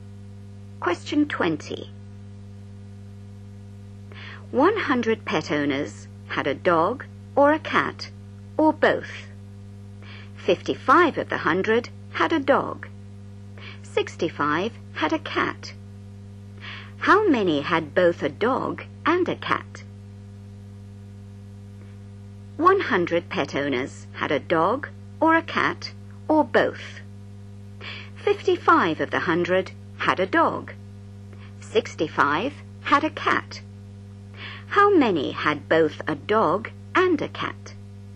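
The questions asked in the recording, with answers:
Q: How many had both a dog and a cat?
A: 20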